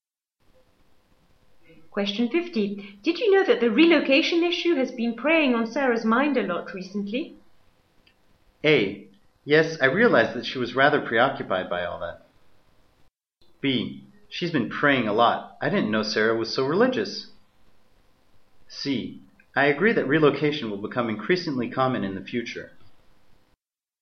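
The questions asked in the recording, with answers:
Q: Did you know that the relocation issue has been preying on Sarah's mind a lot recently?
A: A: Yes, I realized that she was rather preoccupied by all that.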